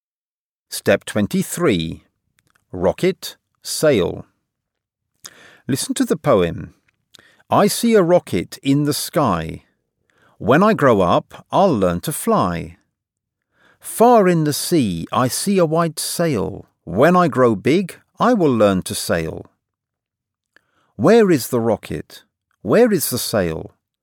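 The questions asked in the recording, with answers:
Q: Where is the rocket?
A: In the sky

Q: Where is the sail?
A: Far in the sea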